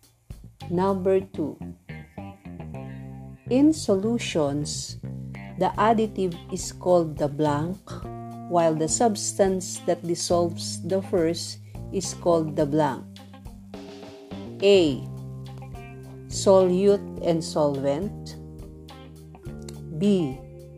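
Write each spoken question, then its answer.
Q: in solutions, the additive is called the blank, while the substance that dissolves the first is called the blank.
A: A: Solute and solvent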